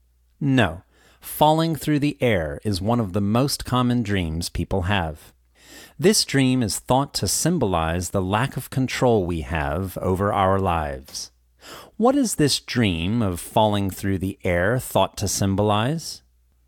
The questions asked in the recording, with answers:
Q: What is this dream of falling through the air thought to symbolize?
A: This dream of falling through the air is thought to symbolize the lack of control we have over our lives.